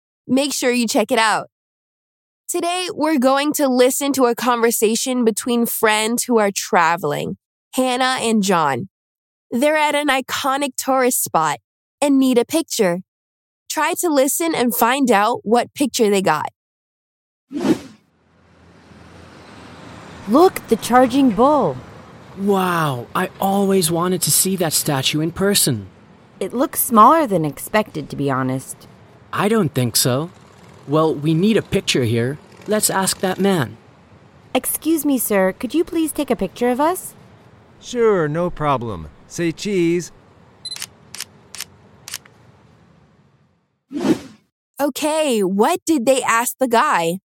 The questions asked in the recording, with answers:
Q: Okay, what did they ask the guy?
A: So, Hannah asked the man for a picture